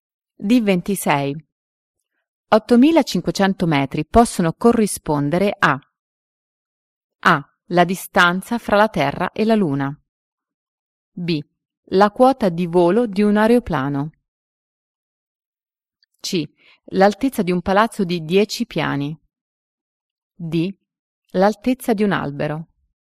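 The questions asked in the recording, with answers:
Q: 8.500 metri possono corrispondere a A.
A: B: La quota di volo di un aeroplano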